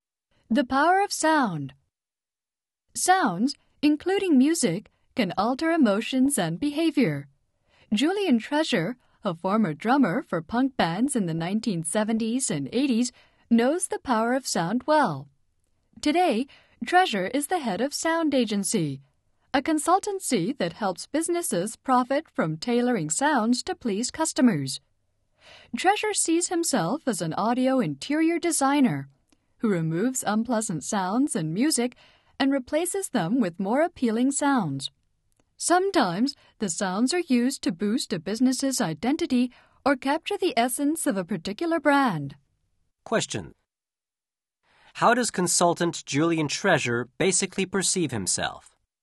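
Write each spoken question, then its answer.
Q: How does consultant Julian Treasure basically perceive himself?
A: As an audio interior designer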